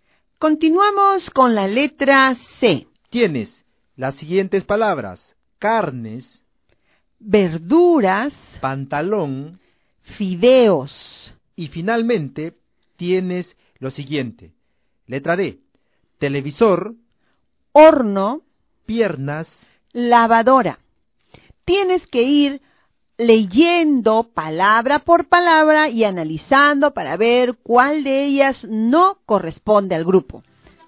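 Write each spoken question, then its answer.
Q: Tienes las siguientes palabras: carnes,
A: pantalón

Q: Letra D: televisor,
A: piernas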